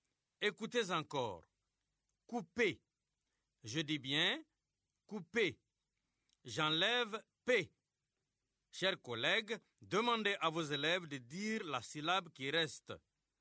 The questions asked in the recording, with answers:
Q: Couper. Je dis bien couper. J'enlève P. Chers collègues, demandez à vos élèves de dire la syllabe qui reste.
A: Il reste cou.